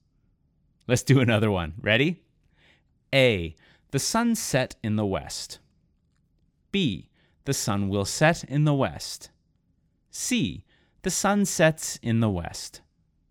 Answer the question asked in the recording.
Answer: But the answer is C.